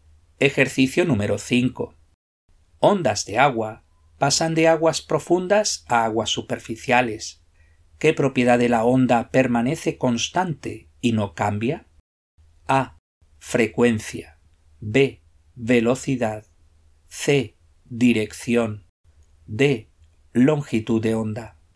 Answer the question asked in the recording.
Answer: La respuesta correcta es la frecuencia.